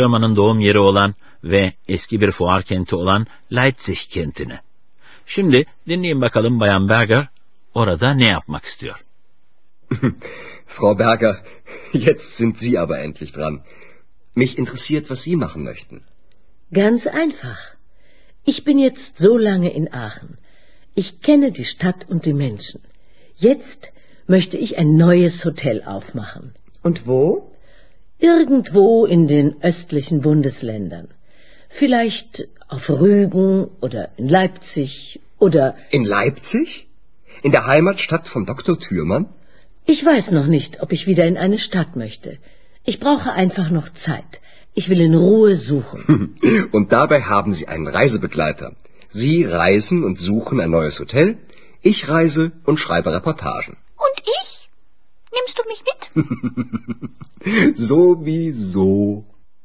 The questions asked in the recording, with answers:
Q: Şimdi dinleyin bakalım Bayan Berger orada ne yapmak istiyor.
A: Bayan Berger yeni bir otel açmak istiyor.